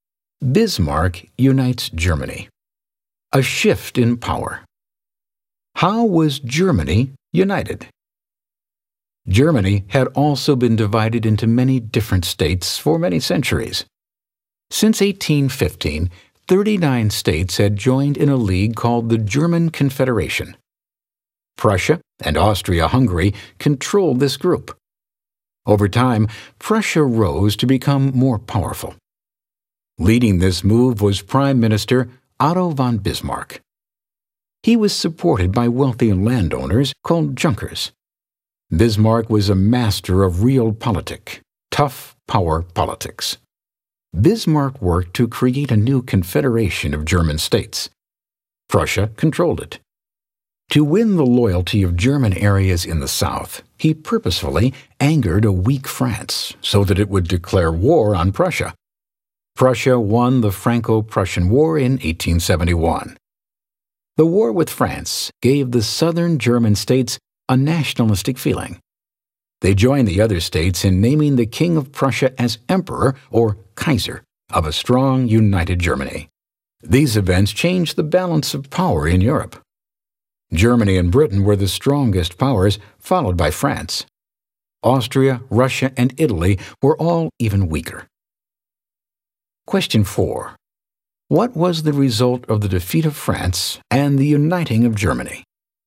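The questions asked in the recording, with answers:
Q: What was the result of the defeat of France and the uniting of Germany?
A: A shift in the balance of power in Europe: Germany and Britain became the strongest powers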